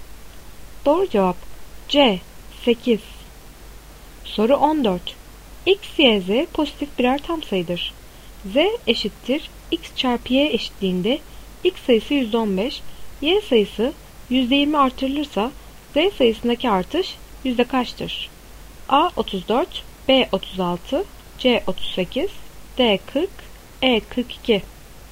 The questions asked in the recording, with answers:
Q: Z eşittir X çarpı Y eşitliğinde X sayısı %15, Y sayısı %20 artırılırsa Z sayısındaki artış yüzde kaçtır?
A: Doğru cevap C 38.